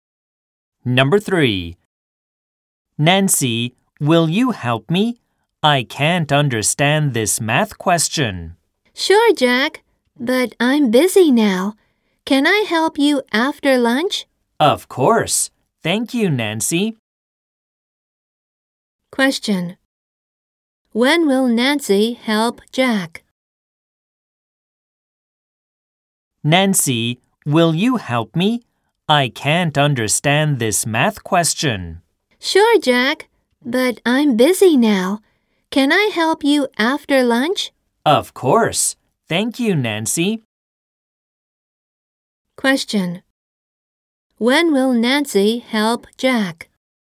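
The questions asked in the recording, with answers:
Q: When will Nancy help Jack?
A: After lunch.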